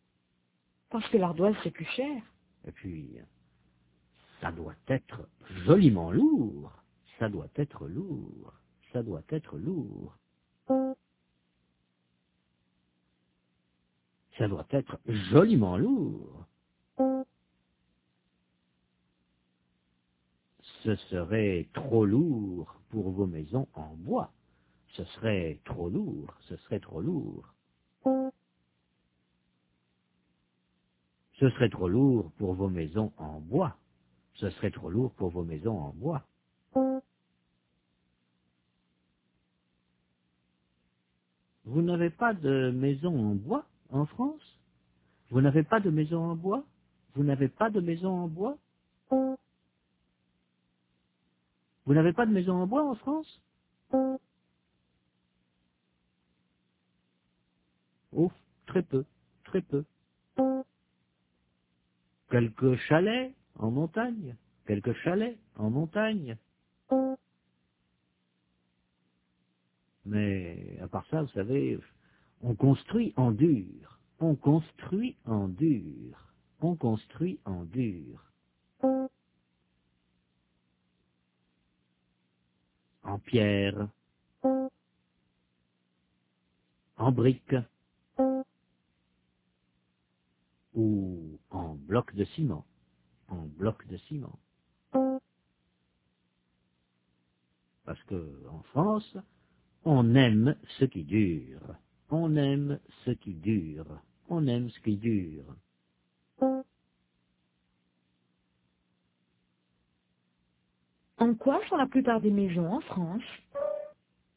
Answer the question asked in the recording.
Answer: En dur, en pierre, en briques ou en blocs de ciment.